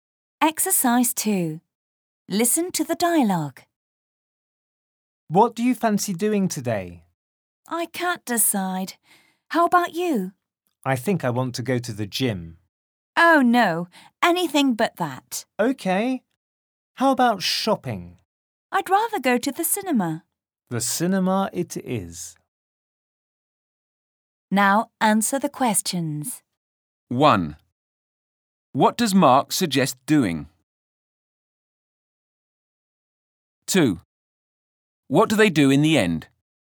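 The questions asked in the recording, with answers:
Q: What do they do in the end?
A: They go to the cinema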